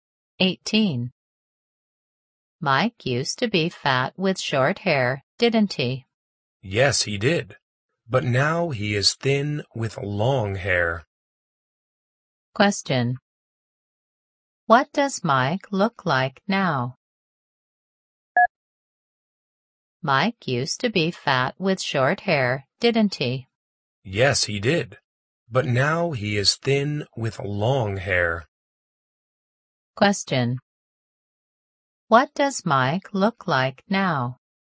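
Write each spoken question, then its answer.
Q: What does Mike look like now?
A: Thin with long hair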